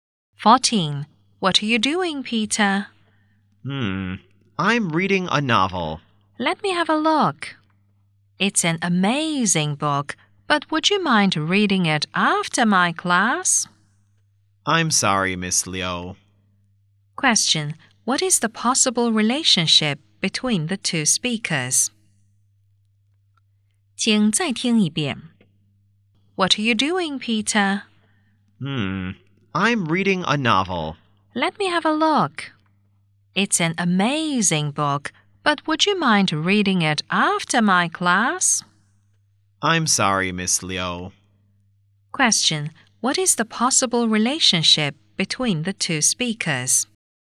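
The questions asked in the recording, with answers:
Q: what is the possible relationship between the two speakers?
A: Teacher and student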